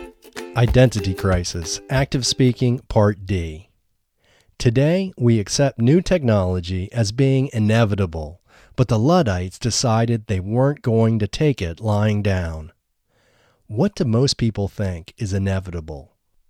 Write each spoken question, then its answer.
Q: What do most people think is inevitable?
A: Most people think new technology is inevitable.